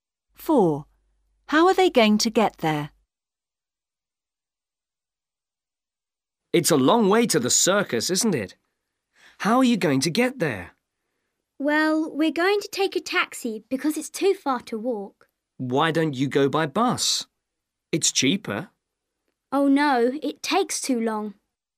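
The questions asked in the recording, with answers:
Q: How are they going to get there?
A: by taxi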